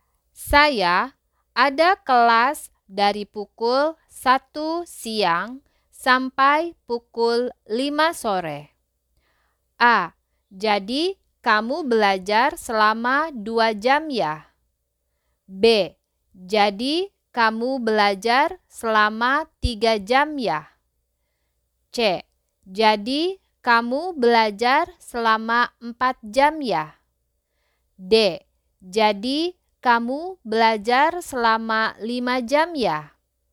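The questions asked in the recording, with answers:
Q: Saya ada kelas dari pukul 1 siang sampai pukul 5 sore.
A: C: jadi kamu belajar selama 4 jam ya?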